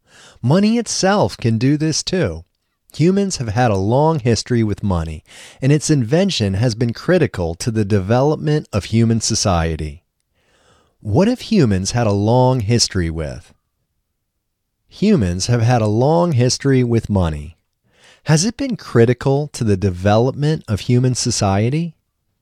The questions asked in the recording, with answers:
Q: What have humans had a long history with?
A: Humans have had a long history with money.

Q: Has it been critical to the development of human society?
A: Yes, it has been critical to the development of human society.